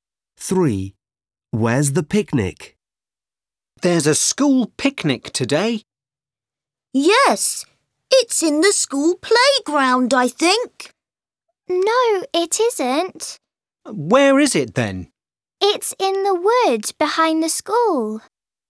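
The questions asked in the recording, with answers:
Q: Where's the picnic?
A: in the woods behind the school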